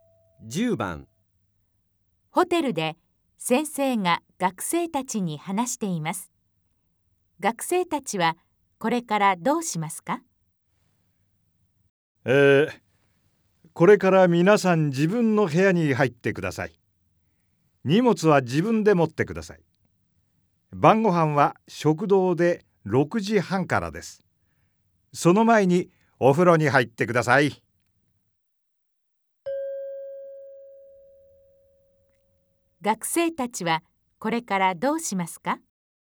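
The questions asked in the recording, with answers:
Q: 学生たちはこれからどうしますか?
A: 自分で荷物を持って、自分の部屋に入る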